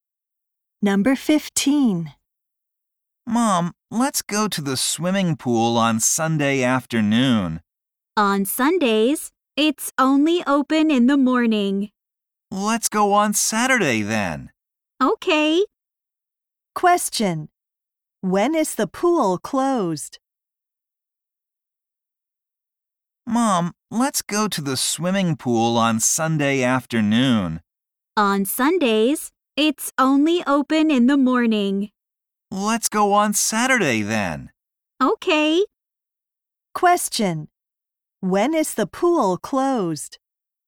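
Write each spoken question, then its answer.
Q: When is the pool closed?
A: On Sunday afternoons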